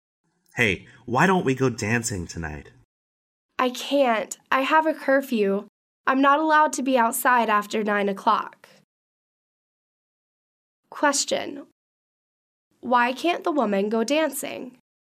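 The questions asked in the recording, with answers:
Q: Why can't the woman go dancing?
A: She has a curfew and isn't allowed out after 9 o'clock.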